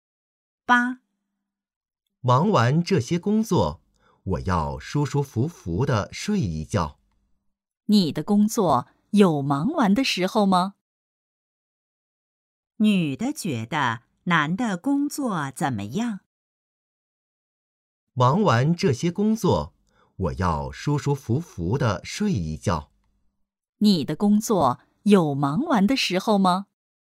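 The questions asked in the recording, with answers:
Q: 女的觉得男的工作怎么样?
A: 很忙,忙不完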